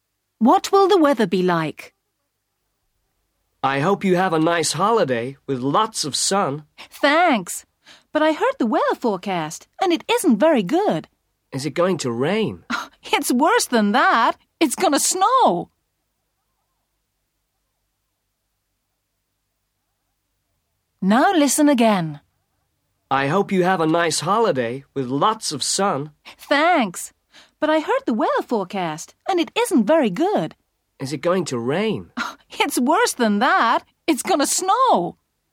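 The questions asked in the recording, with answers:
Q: What will the weather be like?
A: snow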